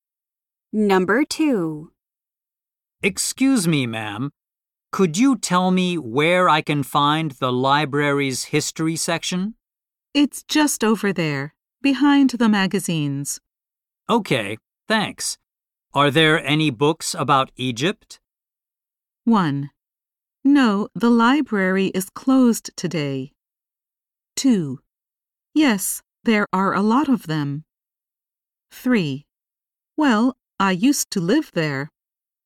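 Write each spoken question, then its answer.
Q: Okay, thanks. Are there any books about Egypt?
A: 2: Yes, there are a lot of them.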